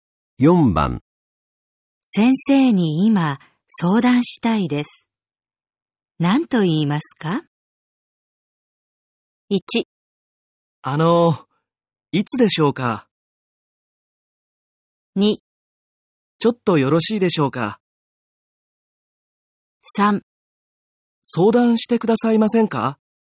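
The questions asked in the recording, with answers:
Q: 先生に今相談したいです。何と言いますか?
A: 2: ちょっとよろしいでしょうか?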